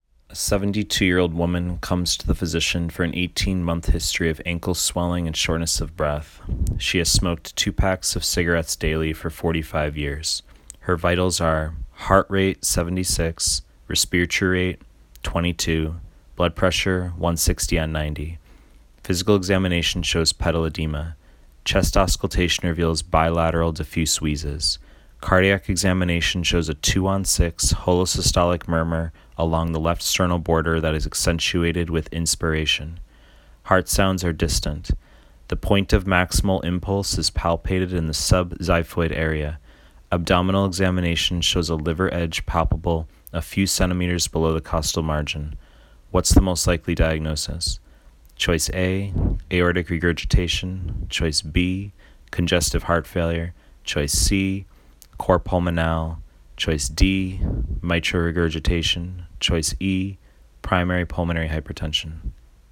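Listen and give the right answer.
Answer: C: cor pulmonale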